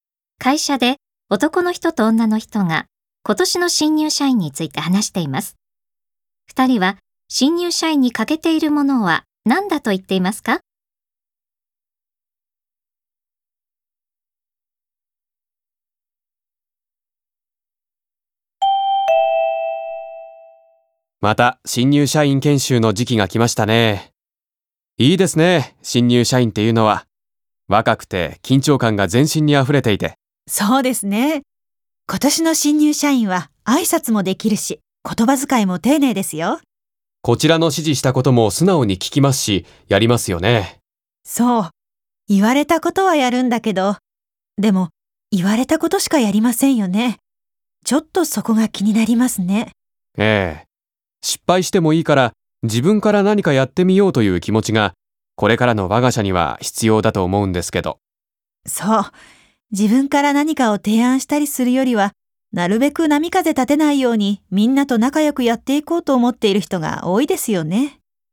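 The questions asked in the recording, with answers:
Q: 2人は新入社員に欠けているものは何だと言っていますか?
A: 失敗を恐れず自分から何かやってみようという積極性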